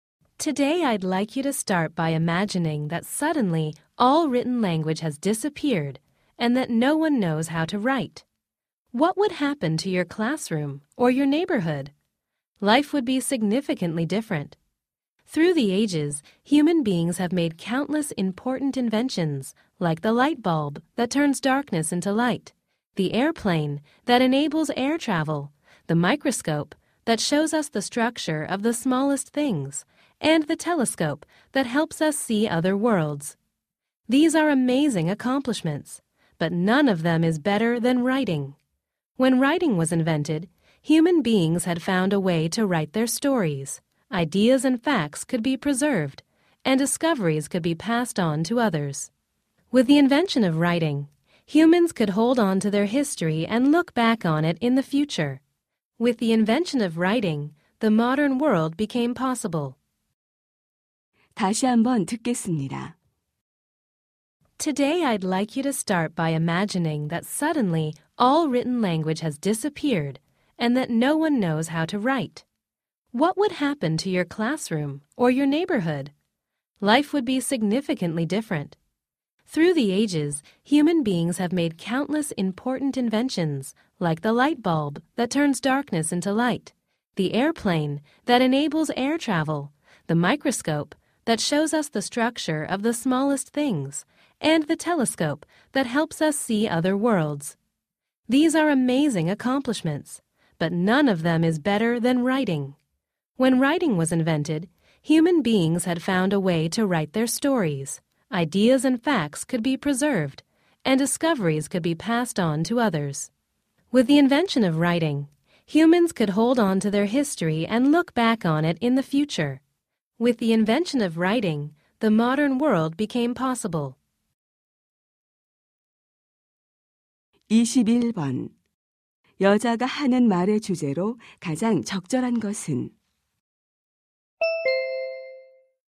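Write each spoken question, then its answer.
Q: 여자가 하는 말의 주제로 가장 적절한 것은?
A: 인류 최고의 발명품인 문자(글쓰기)의 중요성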